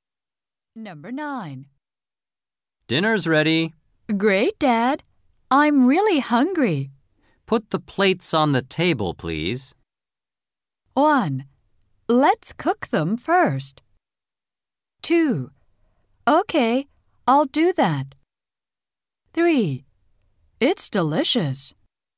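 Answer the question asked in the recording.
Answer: 2: Okay, I'll do that.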